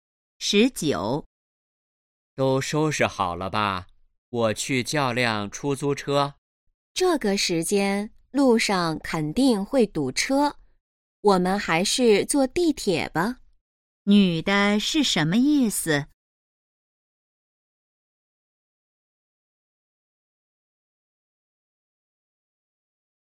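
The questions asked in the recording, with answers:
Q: 女的是什么意思?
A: 坐地铁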